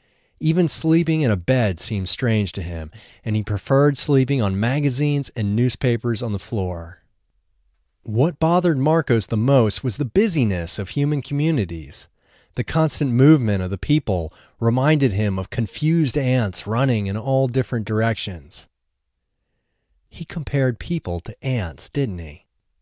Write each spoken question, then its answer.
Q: He compared people to ants, didn't he?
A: Yes, he compared people to ants.